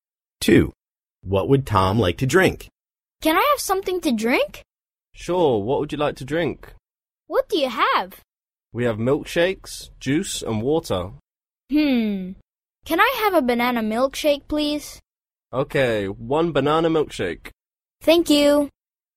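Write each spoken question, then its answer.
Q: What would Tom like to drink?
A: A banana milkshake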